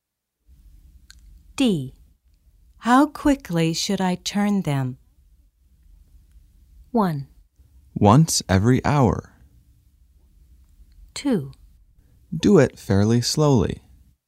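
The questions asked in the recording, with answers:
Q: How quickly should I turn them?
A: 2: Do it fairly slowly.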